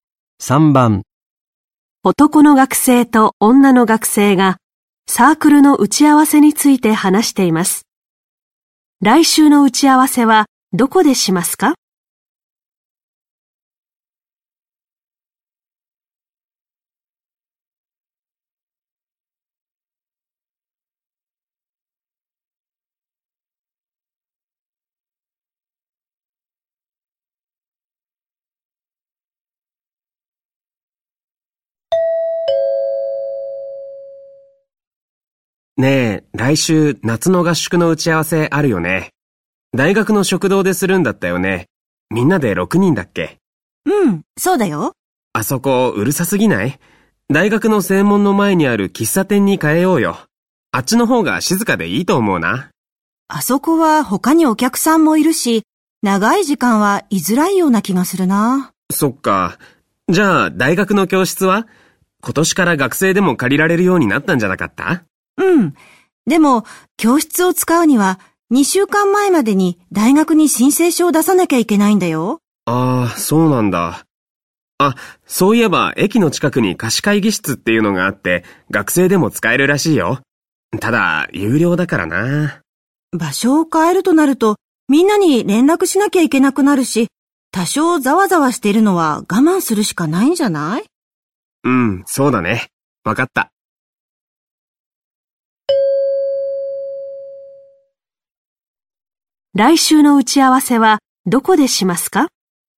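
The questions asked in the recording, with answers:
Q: 来週の打ち合わせはどこでしますか?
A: 大学の食堂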